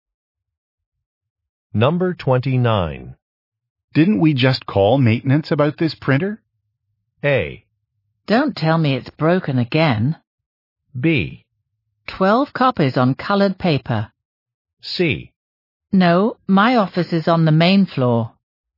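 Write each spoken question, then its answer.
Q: Didn't we just call maintenance about this printer?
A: A: Don't tell me it's broken again.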